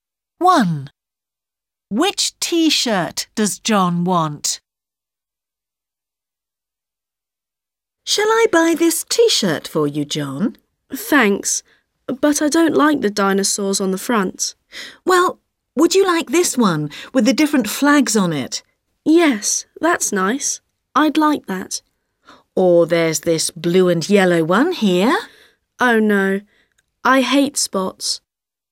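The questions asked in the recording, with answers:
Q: Which T-shirt does John want?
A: the one with the different flags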